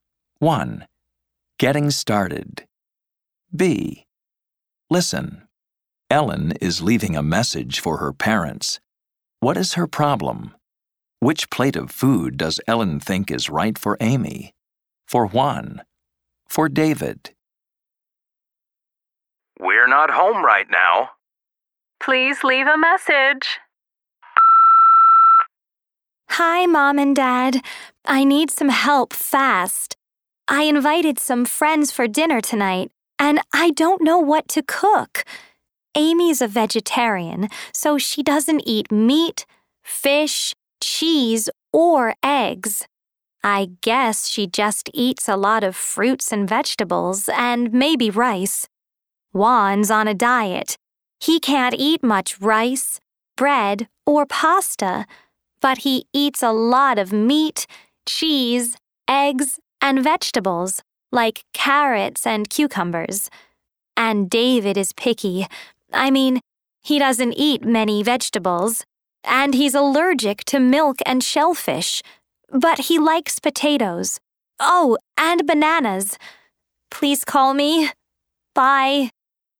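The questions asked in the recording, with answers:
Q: What is her problem?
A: She invited friends for dinner and doesn't know what to cook.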